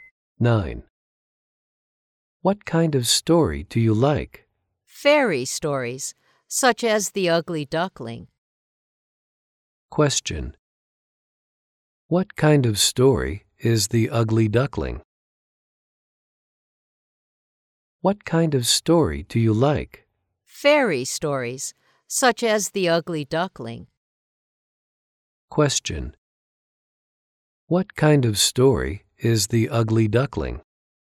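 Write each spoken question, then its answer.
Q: What kind of story is The Ugly Duckling?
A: A fairy story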